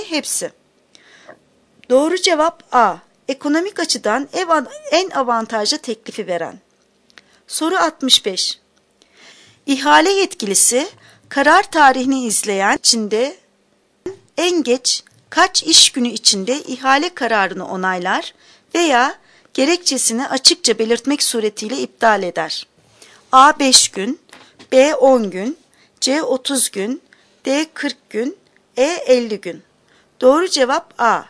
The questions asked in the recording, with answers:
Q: İhale yetkilisi karar tarihini izleyen içinde en geç kaç iş günü içinde ihale kararını onaylar veya gerekçesini açıkça belirtmek suretiyle iptal eder?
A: Doğru cevap A. 5 gün.